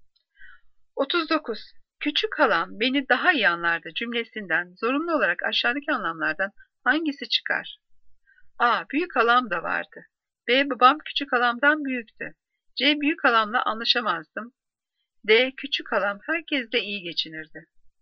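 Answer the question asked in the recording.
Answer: A: Büyük halam da vardı.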